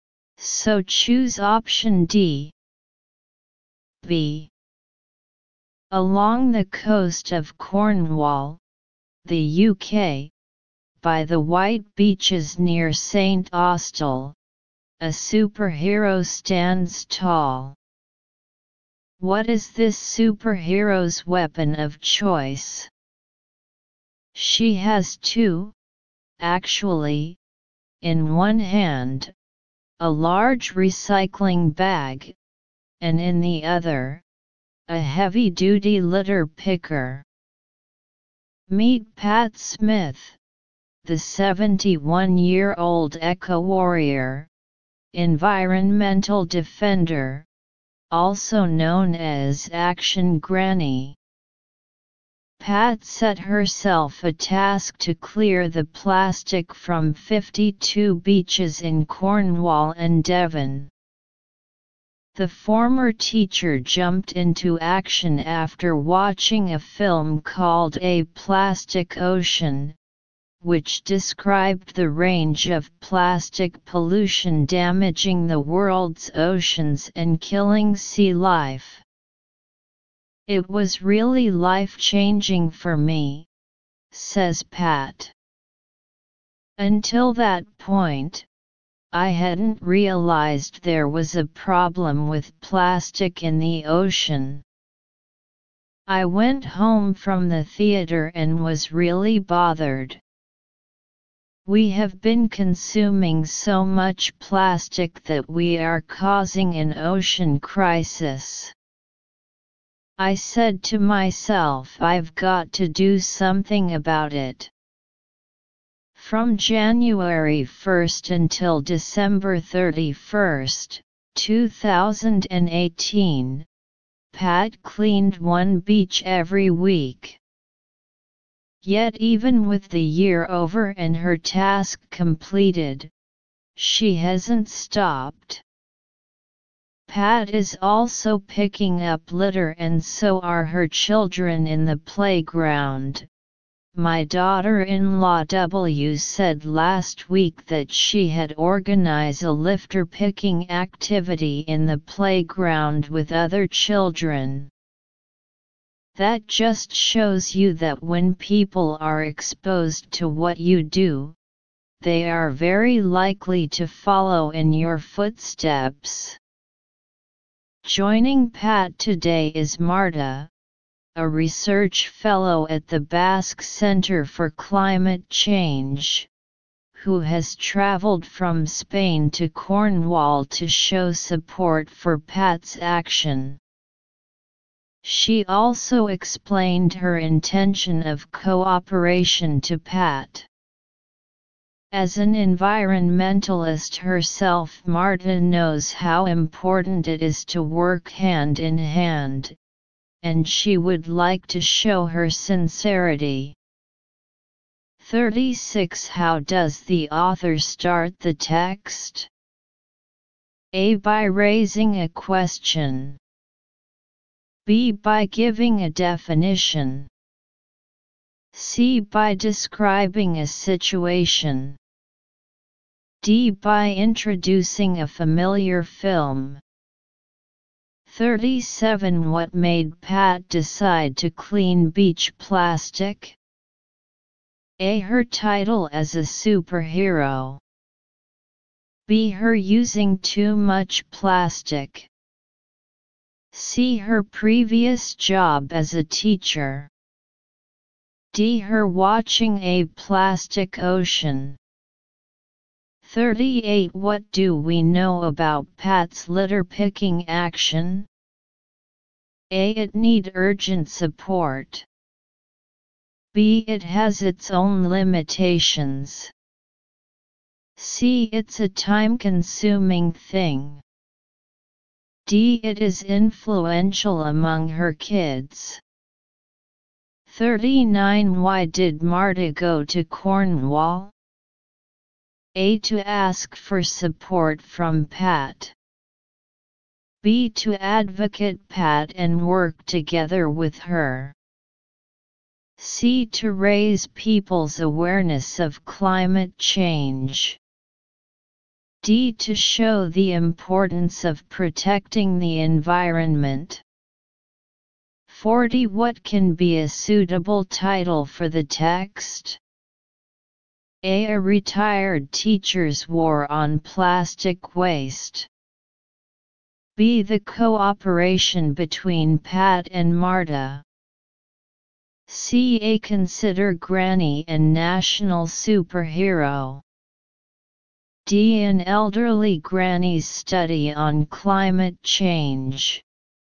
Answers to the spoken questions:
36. 36. C.
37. 37. D.
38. 38. D.
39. 39. B
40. 40 A